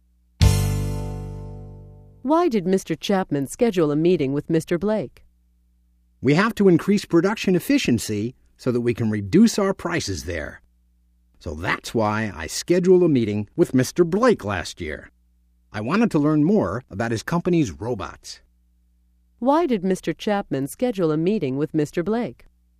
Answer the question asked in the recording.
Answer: He wanted to learn more about the robots made by Mr. Blake's company.